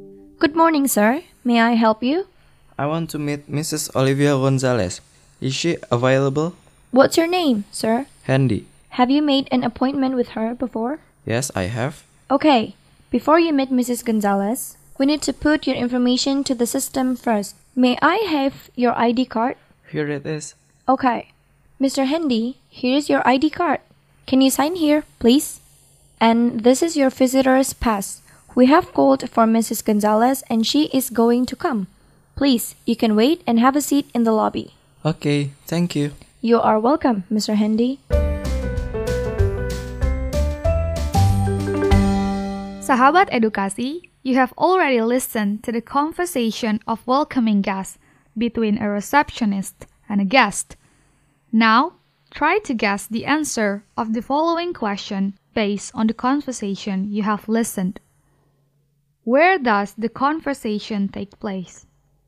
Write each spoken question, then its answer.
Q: Where does the conversation take place?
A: Yes, you are correct. The answer is in the receptionist counter.